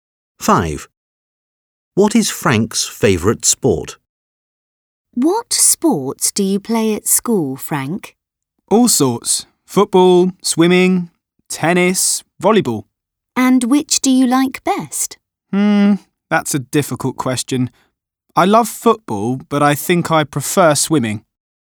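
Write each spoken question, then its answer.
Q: What is Frank's favourite sport?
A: Swimming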